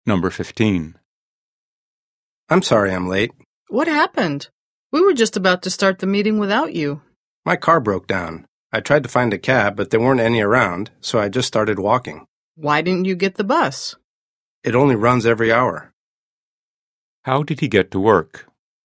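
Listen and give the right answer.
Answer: He walked.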